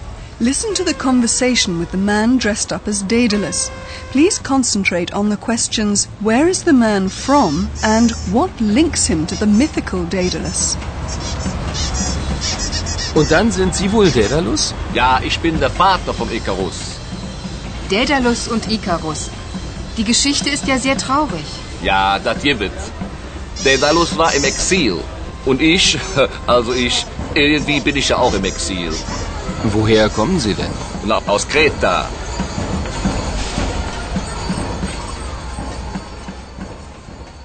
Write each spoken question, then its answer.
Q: where is the man from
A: Kreta? That's where the man comes from, or so he claims

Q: what links him to the mythical Daedalus?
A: And that's what links the carnival reveller with the figure of Daedalus.